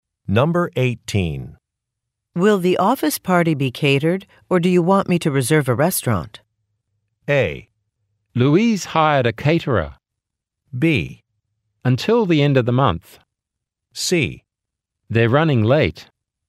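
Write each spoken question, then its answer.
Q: Will the office party be catered, or do you want me to reserve a restaurant?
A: A: Louise hired a caterer.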